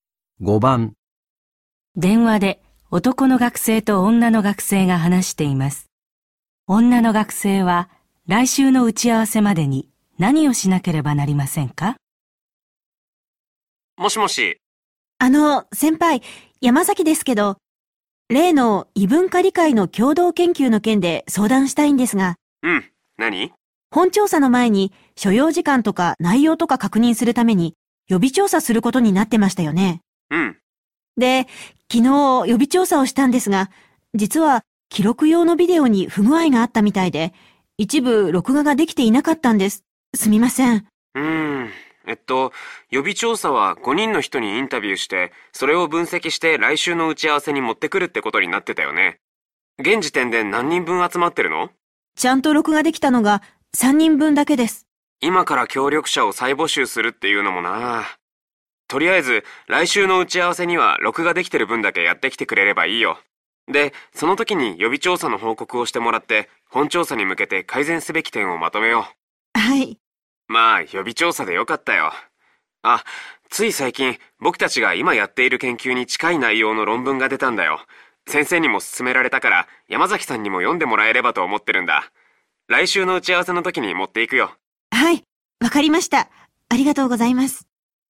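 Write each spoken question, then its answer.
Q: 女の学生は来週の打ち合わせまでに何をしなければなりませんか?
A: 録画できた3人分のインタビューを分析する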